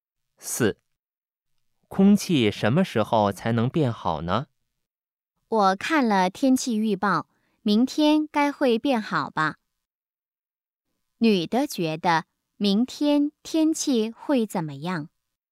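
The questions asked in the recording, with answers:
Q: 女的觉得明天天气会怎么样?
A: 会变好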